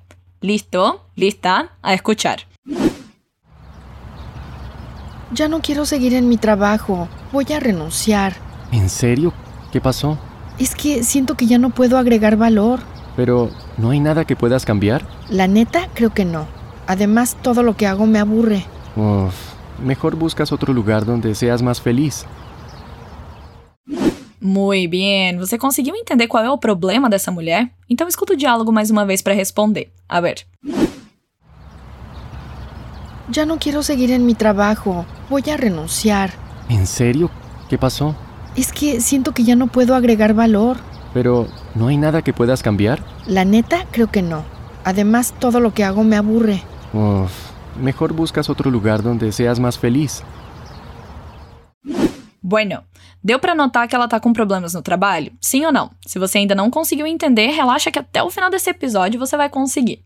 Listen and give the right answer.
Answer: Ela não tá feliz no trabalho porque sente que ela não agrega mais valor e também porque tudo que ela faz deixa ela entediada.